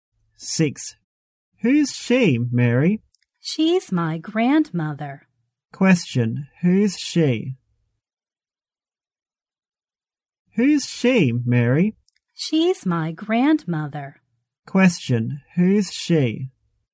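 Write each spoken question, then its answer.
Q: who's she?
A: Mary's grandmother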